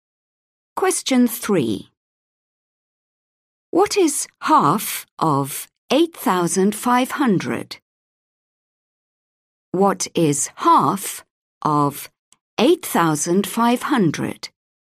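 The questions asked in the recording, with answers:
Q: What is half of 8,500?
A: 4,250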